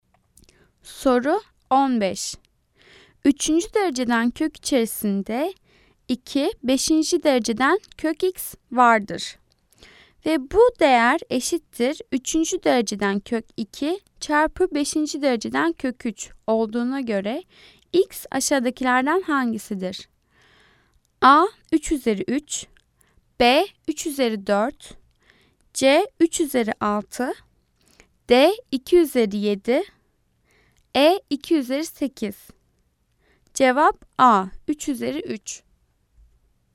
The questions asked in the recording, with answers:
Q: Ve bu değer eşittir üçüncü dereceden kök 2 çarpı beşinci dereceden kök 3 olduğuna göre x aşağıdakilerden hangisidir?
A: Cevap A 3 üzeri 3.